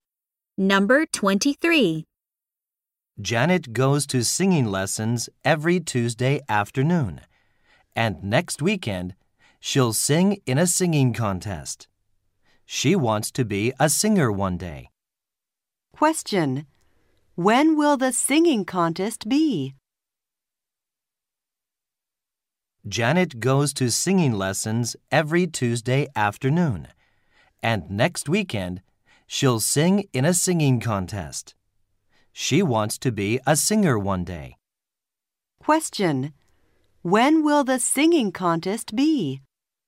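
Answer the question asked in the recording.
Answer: Next weekend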